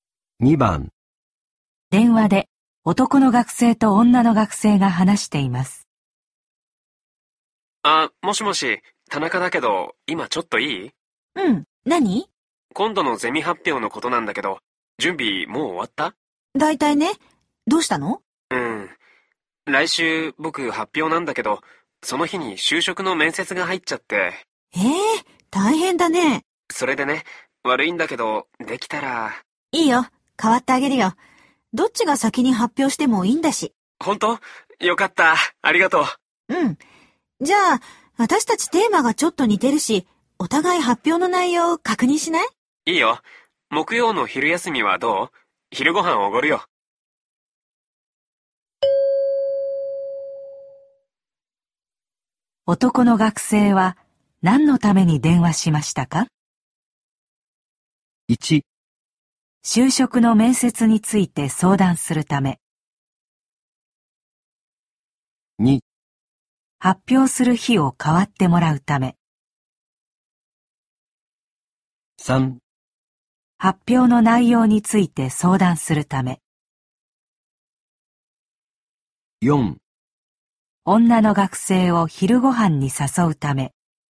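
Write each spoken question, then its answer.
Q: 男の学生は何のために電話しましたか?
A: 2: 発表する日を変わってもらうため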